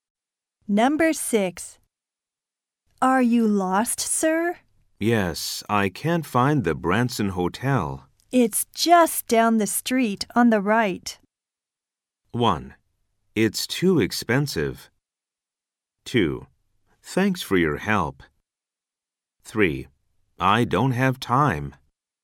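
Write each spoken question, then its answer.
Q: It's just down the street on the right.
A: 2: Thanks for your help.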